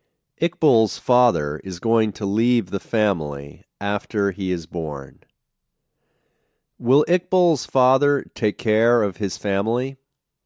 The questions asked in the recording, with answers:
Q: Will Iqbal's father take care of his family?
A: No, he won't take care of his family.